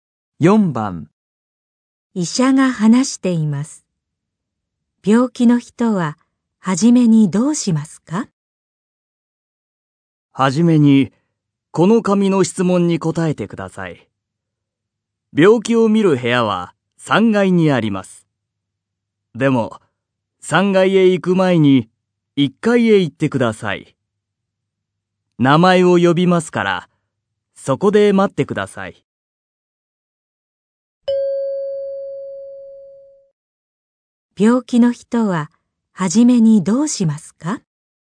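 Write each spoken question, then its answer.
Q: 病気の人は初めにどうしますか?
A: 紙の質問に答える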